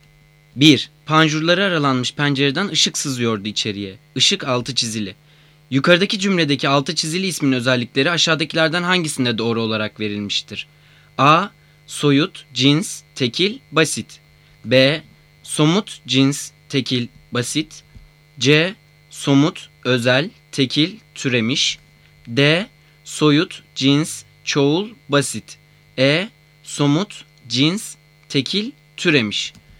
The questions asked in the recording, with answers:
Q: Yukarıdaki cümledeki altı çizili ismin özellikleri aşağıdakilerden hangisinde doğru olarak verilmiştir?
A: Cevap E. Somut, cins, tekil, türemiş.